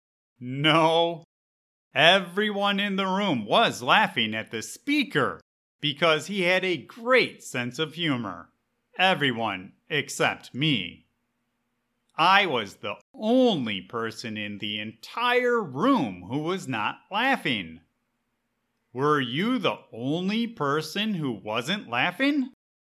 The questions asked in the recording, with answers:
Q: Were you the only person who wasn't laughing?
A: Yep. I was the only person at the conference who was not laughing at the speaker's jokes.